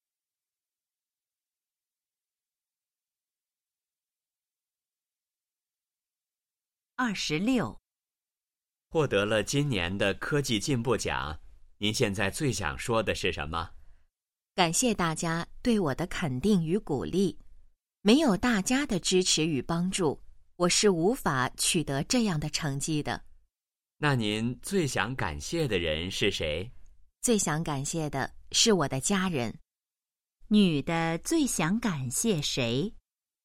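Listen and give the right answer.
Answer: 她的家人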